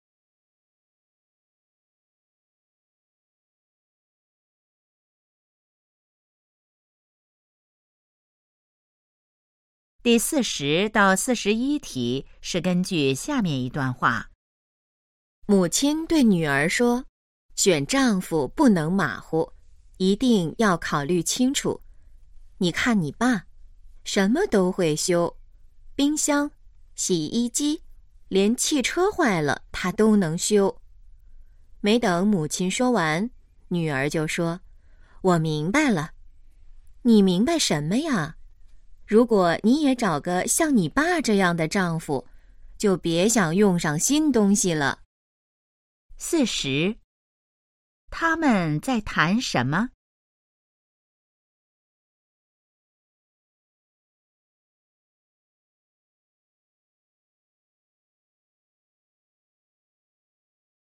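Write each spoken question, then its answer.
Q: 他们在谈什么?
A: 选丈夫

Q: 关于爸爸,可以知道什么?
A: 什么都会修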